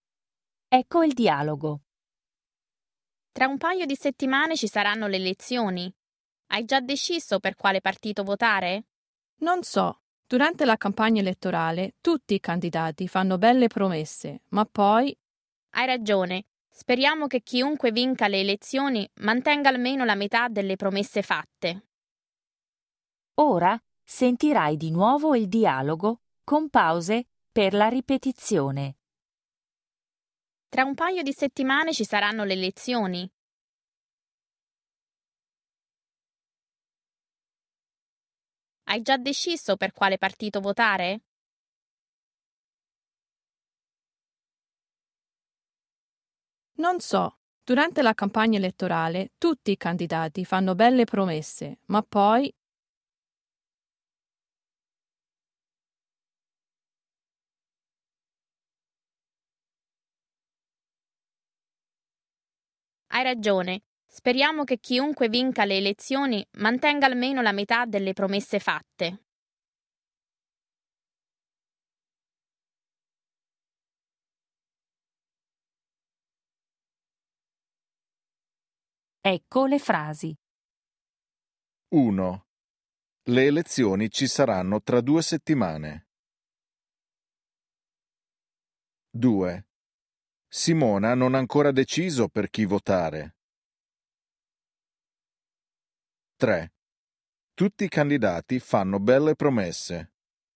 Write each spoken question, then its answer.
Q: Le elezioni ci saranno tra due settimane.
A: 1. Vero.

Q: Simona non ha ancora deciso per chi votare.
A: 2. Vero.